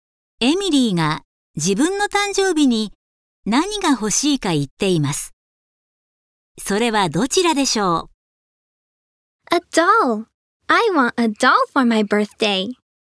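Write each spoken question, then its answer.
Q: エミリーが自分の誕生日に何が欲しいか言っています。それはどちらでしょう?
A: 人形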